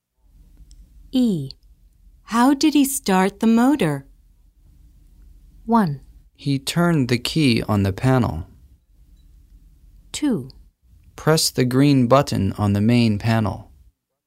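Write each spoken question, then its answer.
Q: How did he start the motor?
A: 1: He turned the key on the panel.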